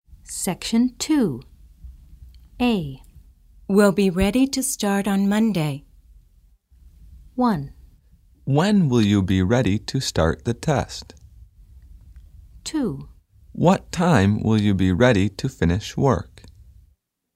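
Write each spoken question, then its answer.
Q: We'll be ready to start on Monday.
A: 1: When will you be ready to start the test?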